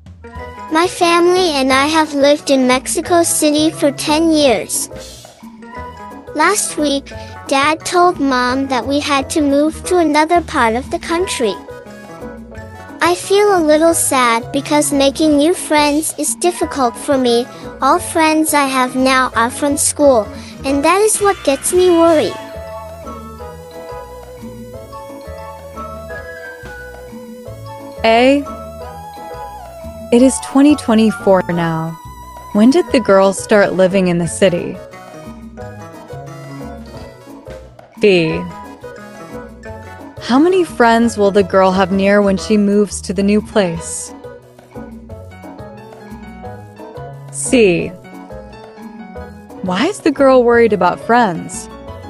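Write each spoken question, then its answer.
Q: It is 2024 now. When did the girls start living in the city?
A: In 2014

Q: Why is the girl worried about friends?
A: All her friends are from school, and making new friends is difficult for her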